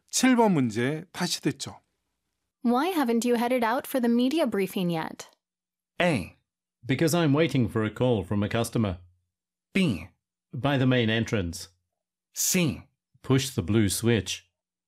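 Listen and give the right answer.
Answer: A: Because I'm waiting for a call from a customer.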